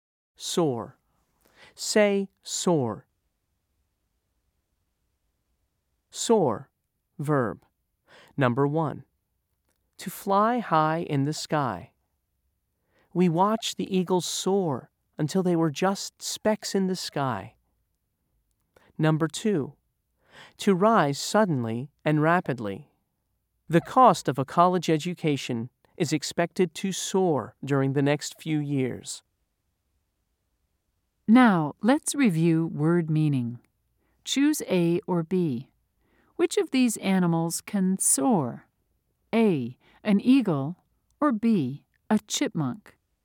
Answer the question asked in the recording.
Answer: If you said A, you're correct.